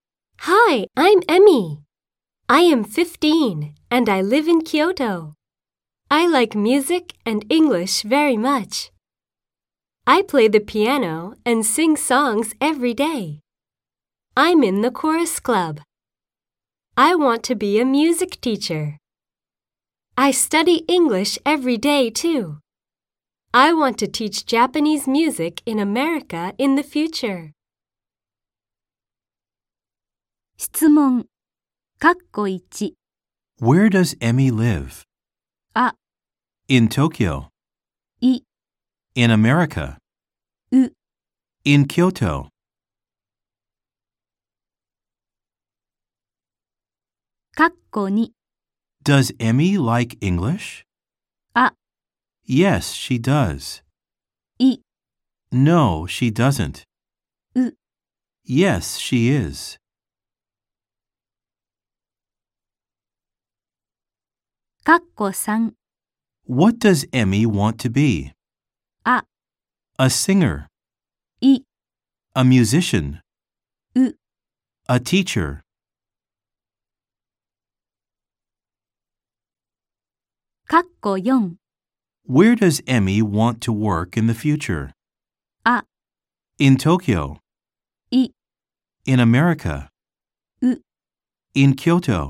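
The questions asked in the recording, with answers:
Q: Where does Emmy live?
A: う: In Kyoto.

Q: Does Emmy like English?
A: あ: Yes, she does.

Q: What does Emmy want to be?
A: う: A teacher.

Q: Where does Emmy want to work in the future?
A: い: In America.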